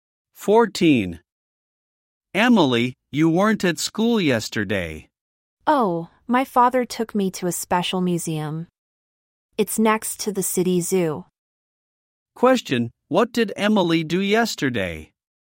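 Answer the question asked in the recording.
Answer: She went to a special museum with her father.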